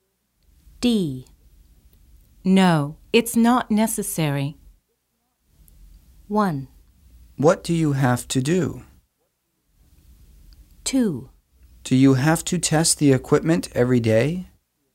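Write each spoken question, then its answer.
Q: No, it's not necessary.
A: 2: Do you have to test the equipment every day?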